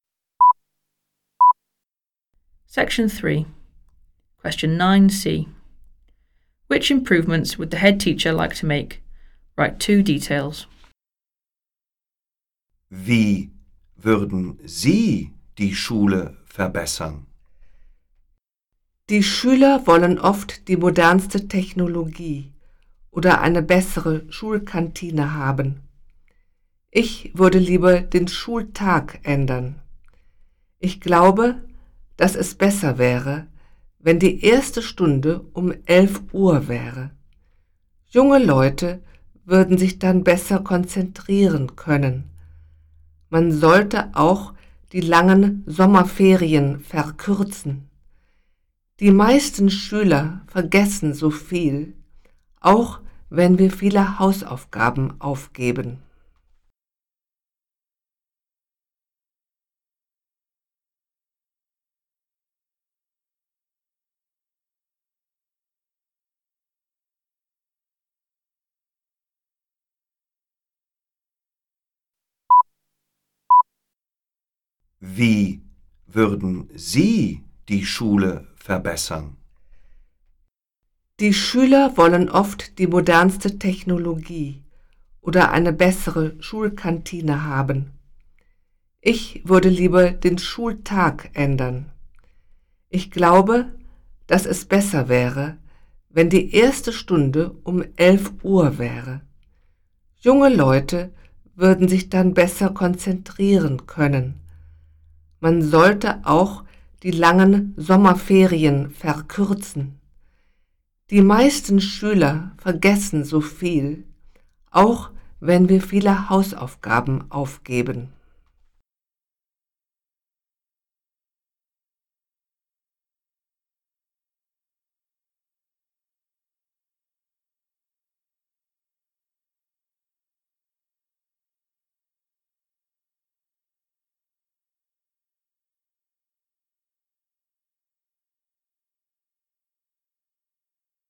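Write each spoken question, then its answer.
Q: Which improvements would the head teacher like to make?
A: Start school at 11 o'clock; shorten the long summer holidays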